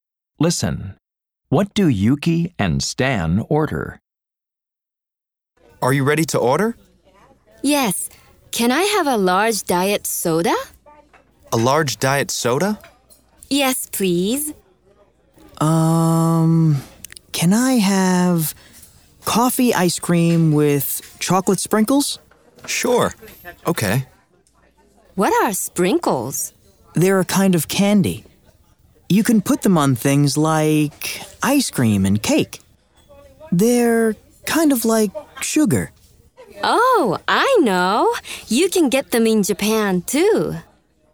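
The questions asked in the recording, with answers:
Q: What do Yuki and Stan order?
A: A large diet soda and coffee ice cream with chocolate sprinkles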